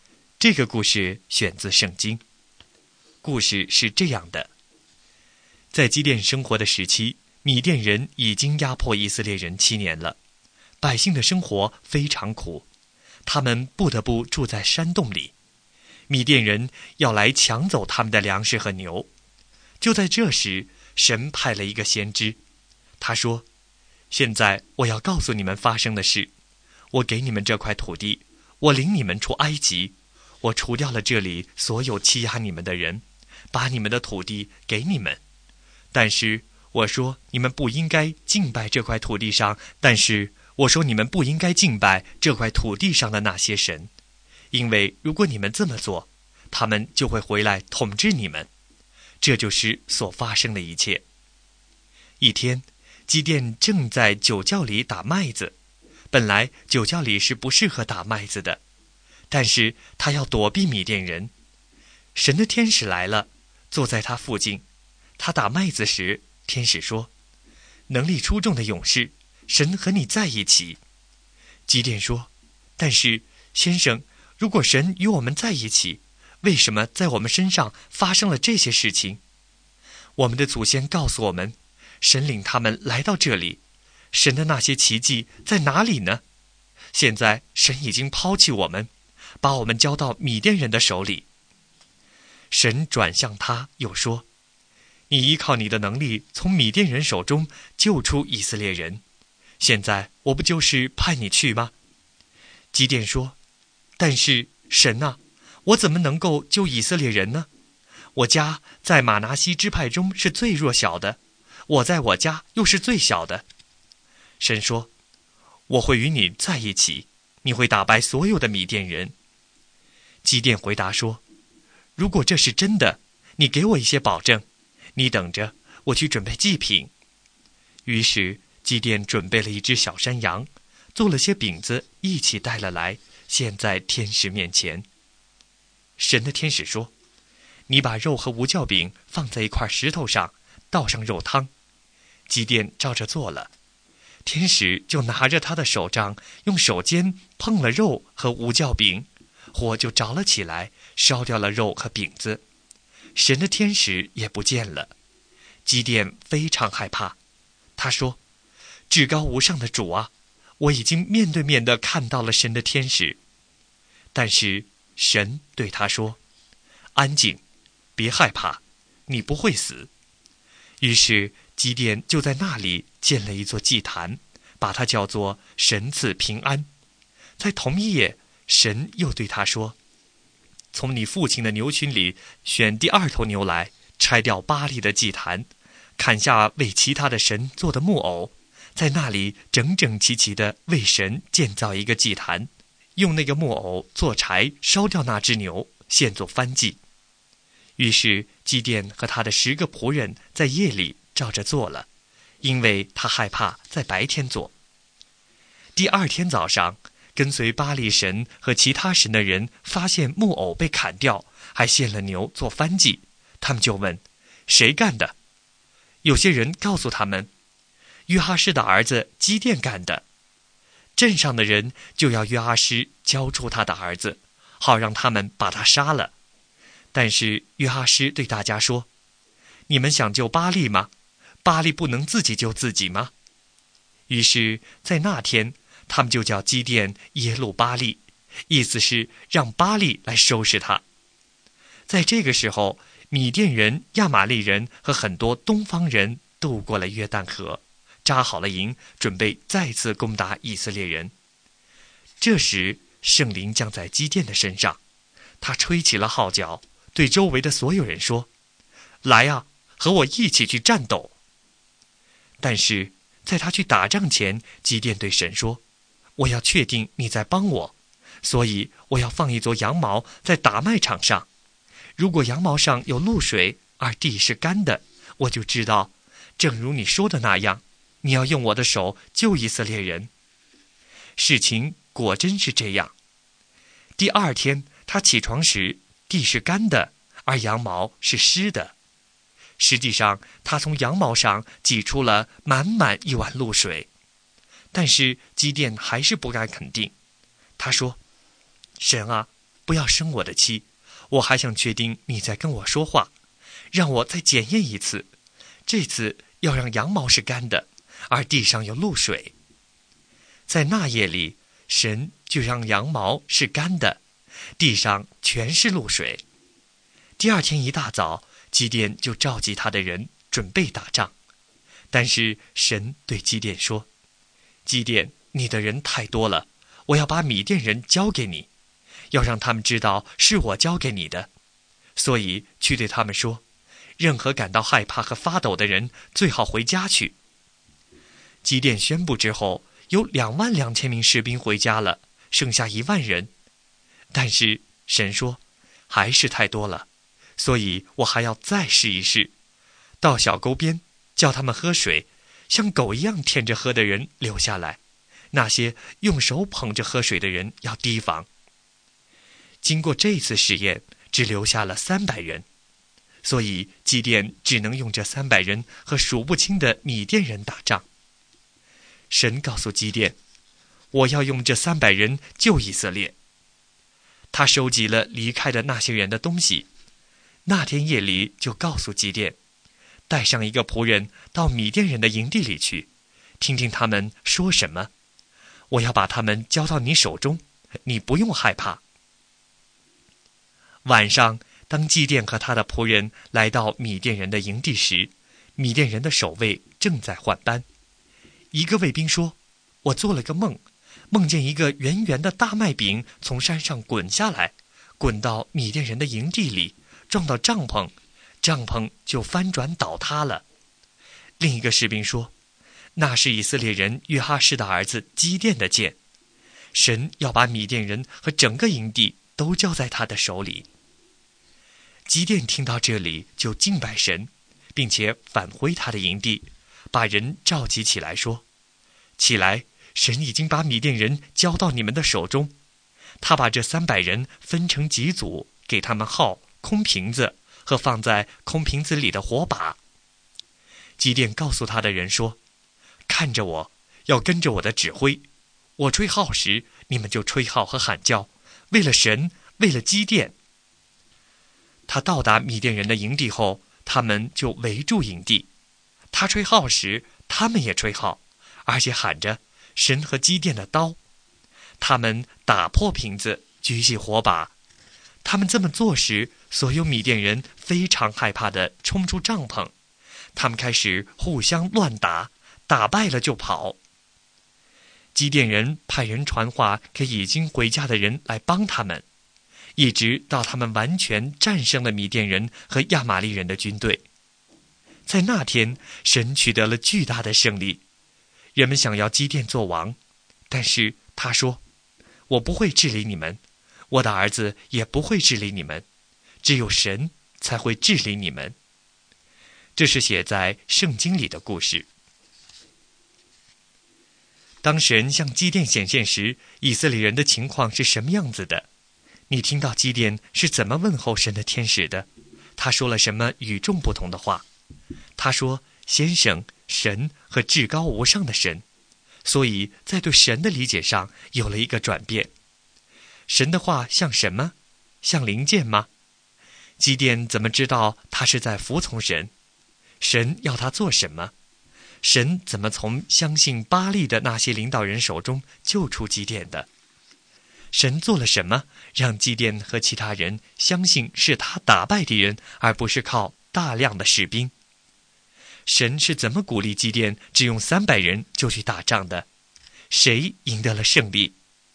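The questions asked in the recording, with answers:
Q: 当神向基甸显现时,以色列人的情况是什么样子的?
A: 被米甸人压迫了七年,生活非常苦,只能住在山洞里,粮食和牛被抢走

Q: 神是怎么鼓励基甸只用300人就去打仗的?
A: 让他带仆人去米甸营地,听到卫兵讲大麦饼的梦和解梦

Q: 谁赢得了胜利?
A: 神(借着基甸和300人)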